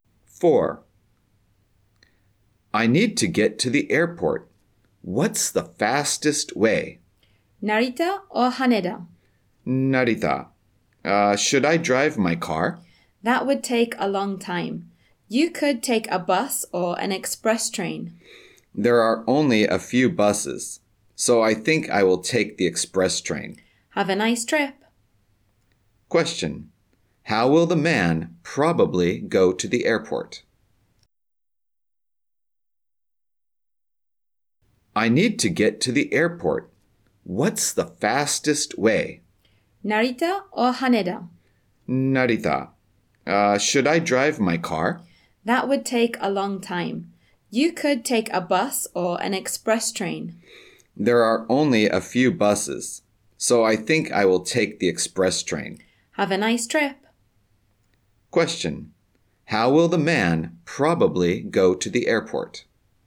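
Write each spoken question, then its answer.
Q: How will the man probably go to the airport?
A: By express train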